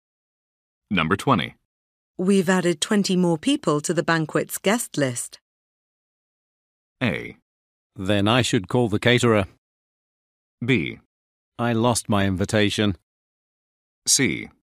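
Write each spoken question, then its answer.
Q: We've added 20 more people to the banquet's guest list.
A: A: Then I should call the caterer.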